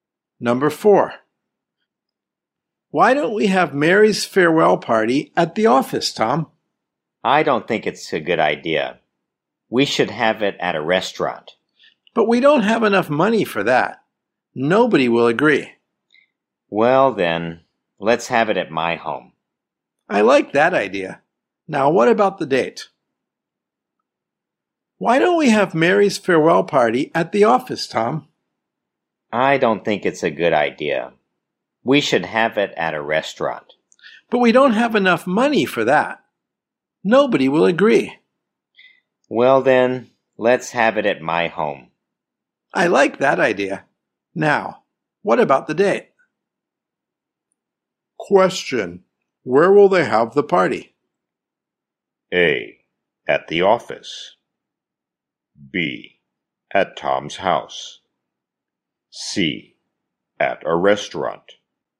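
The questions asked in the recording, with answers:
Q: Where will they have the party?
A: B: At Tom's house.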